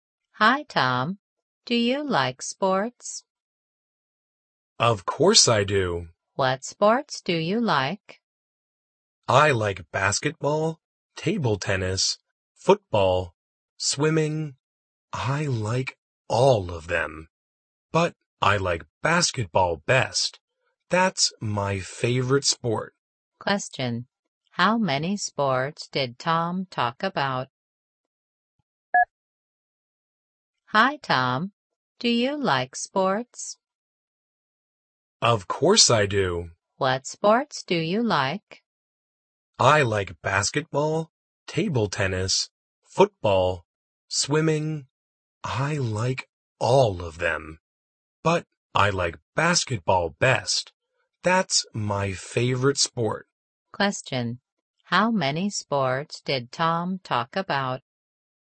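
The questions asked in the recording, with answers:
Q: How many sports did Tom talk about?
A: Four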